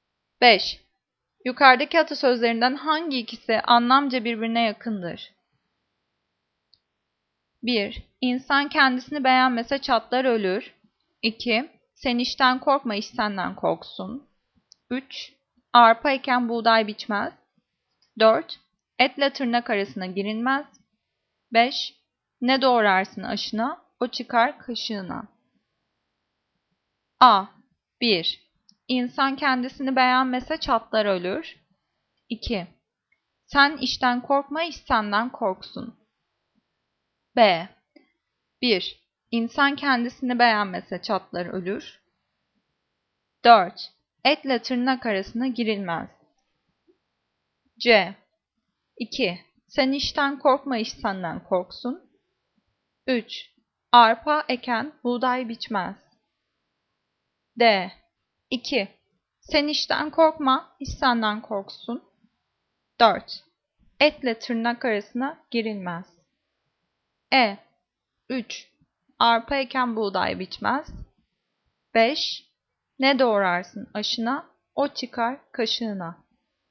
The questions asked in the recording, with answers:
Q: Yukarıdaki atasözlerinden hangi ikisi anlamca birbirine yakındır?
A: E. Arpa eken buğday biçmez.